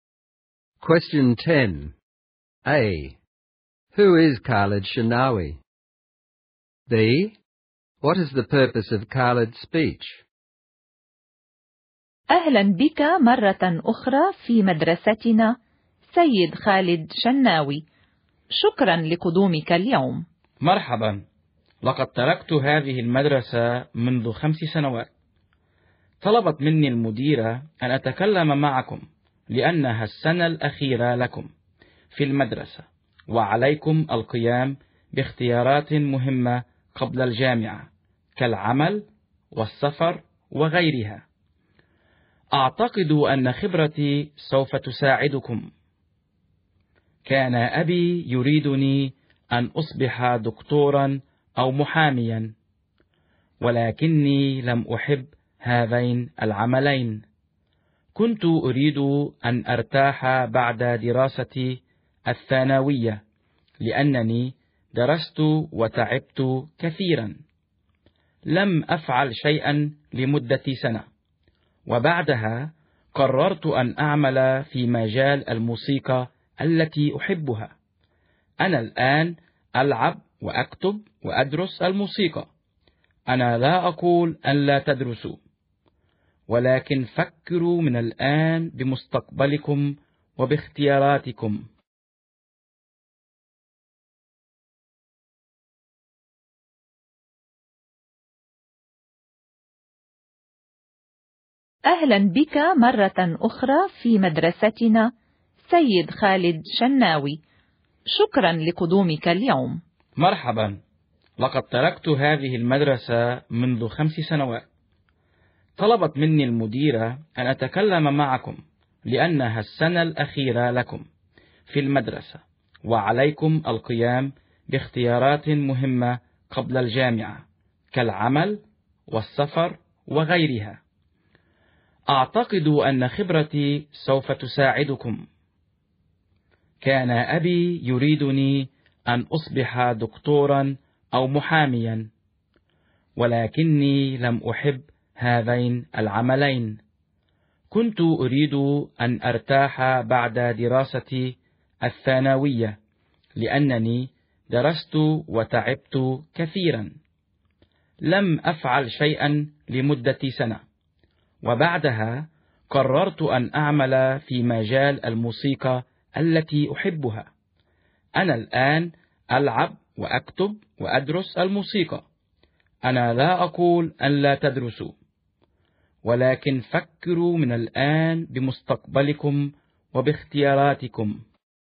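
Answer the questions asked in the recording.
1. A former student who left the school 5 years ago and now works in music
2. To use his own experience to encourage final-year students to think now about their future and their choices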